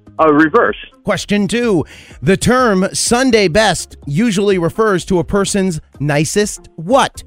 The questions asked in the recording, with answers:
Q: The term Sunday best usually refers to a person's nicest what?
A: Outfit.